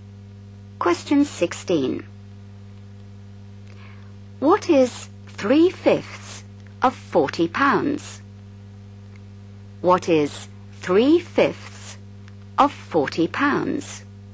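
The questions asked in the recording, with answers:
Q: What is 3/5 of 40 pounds?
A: £24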